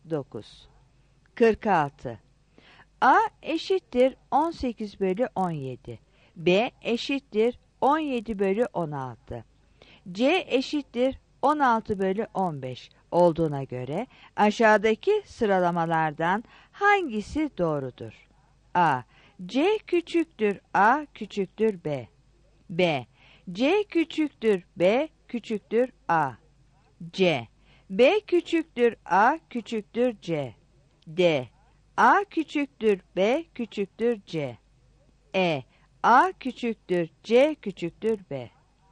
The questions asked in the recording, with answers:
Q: C eşittir 16 bölü 15 olduğuna göre aşağıdaki sıralamalardan hangisi doğrudur?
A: 46 D